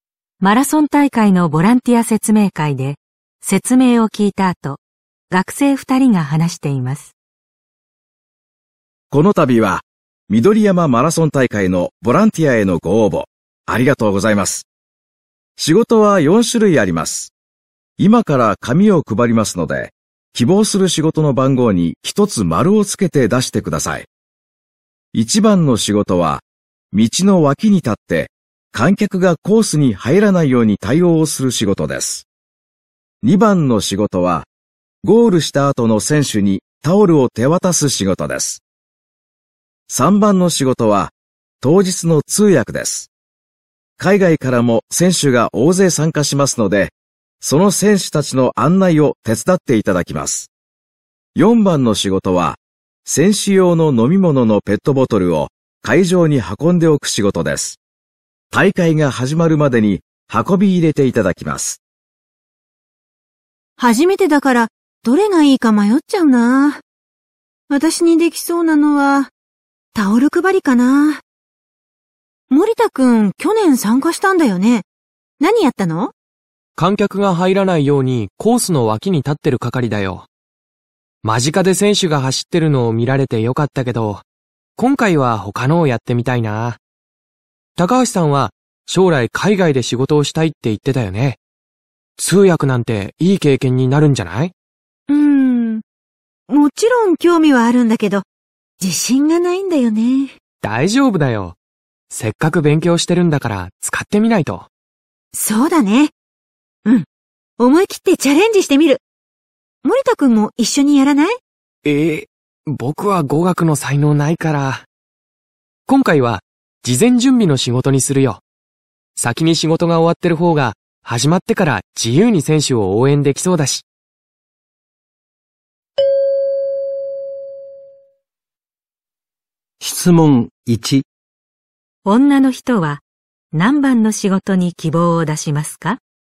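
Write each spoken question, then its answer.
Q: 女の人は何番の仕事に希望を出しますか?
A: 3番(通訳)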